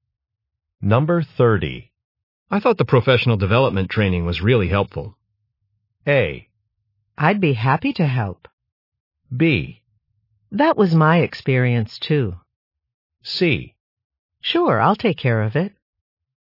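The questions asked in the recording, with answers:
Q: I thought the professional development training was really helpful.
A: B: That was my experience, too.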